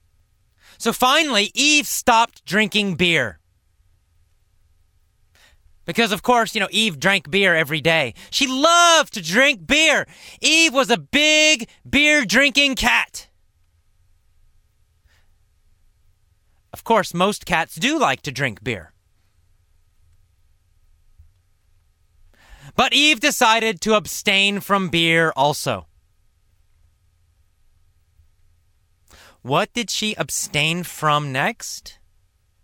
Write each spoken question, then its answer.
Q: What did she abstain from next?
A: Beer. Eve abstained from beer.